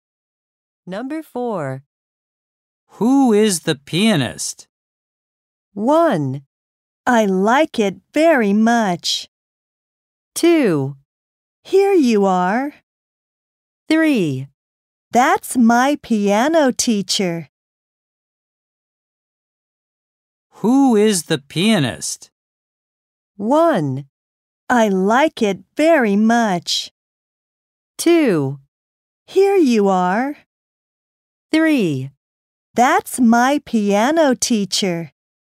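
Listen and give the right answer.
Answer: 3: That's my piano teacher.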